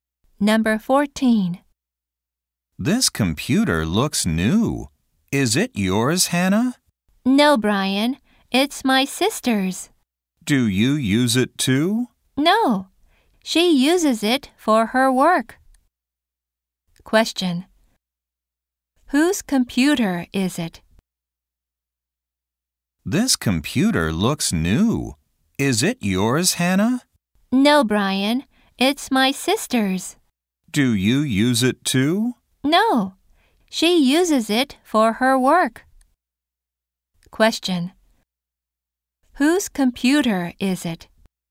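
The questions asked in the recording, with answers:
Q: Whose computer is it?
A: Hannah's sister's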